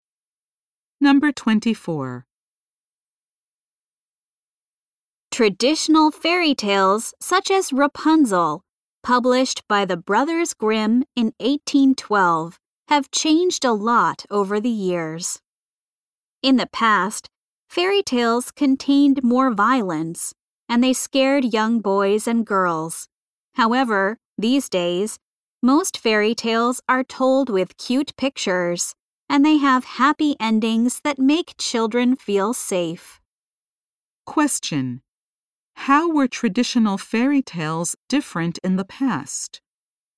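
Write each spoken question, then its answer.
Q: How were traditional fairy tales different in the past?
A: They contained more violence and scared children.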